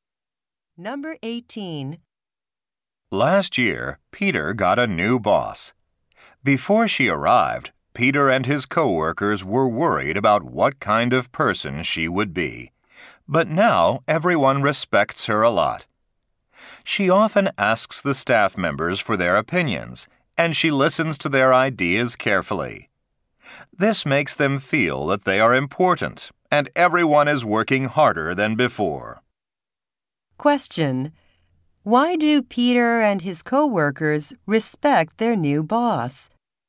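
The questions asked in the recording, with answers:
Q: Why do Peter and his co-workers respect their new boss?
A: She asks for their opinions and listens carefully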